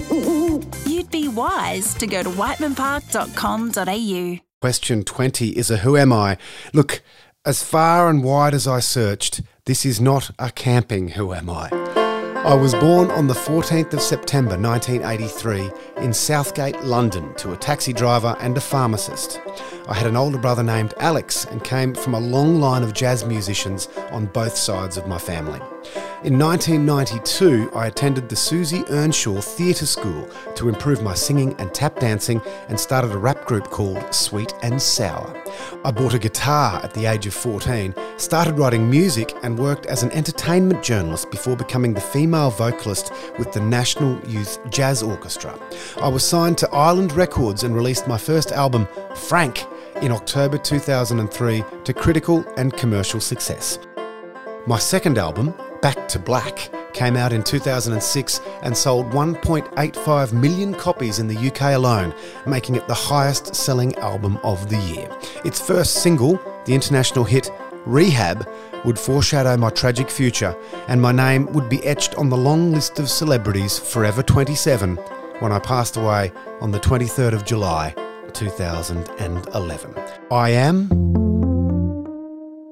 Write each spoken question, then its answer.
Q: Question 20 is a who am I?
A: I am Amy Winehouse